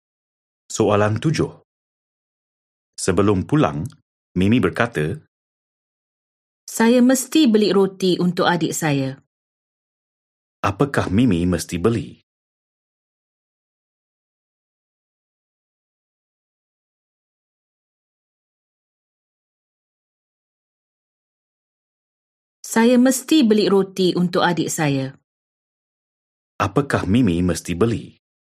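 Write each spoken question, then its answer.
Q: Apakah Mimi mesti beli?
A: roti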